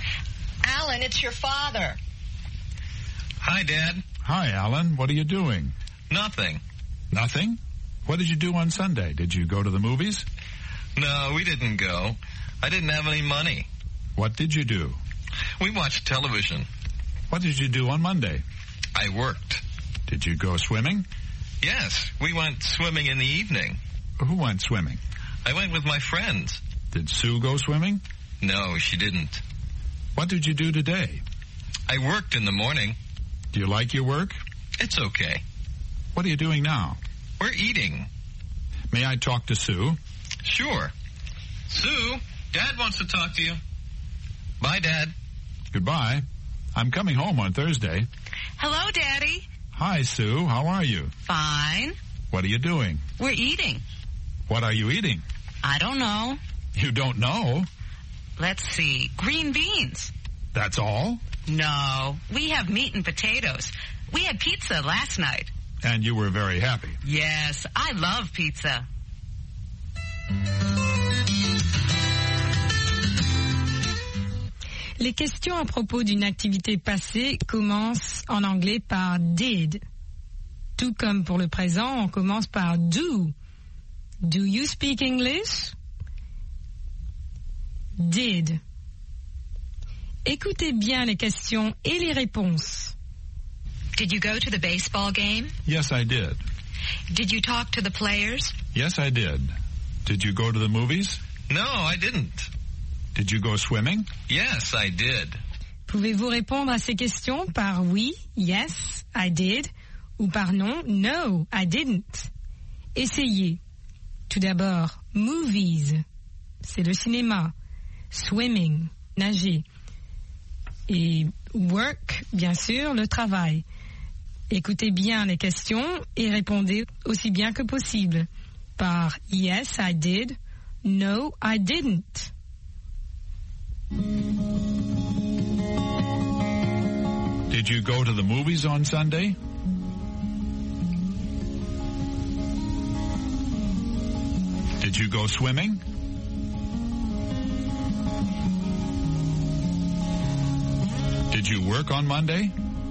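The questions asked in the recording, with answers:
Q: Did you go to the movies on Sunday?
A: No, I didn't.

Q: Did you go swimming?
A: Yes, I did.

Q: Did you work on Monday?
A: Yes, I did.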